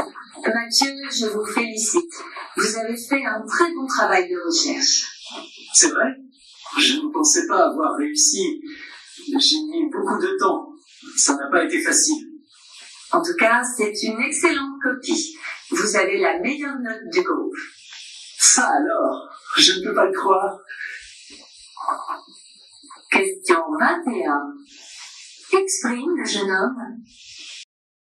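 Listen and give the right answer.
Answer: La surprise (il n'arrive pas à croire qu'il a eu la meilleure note)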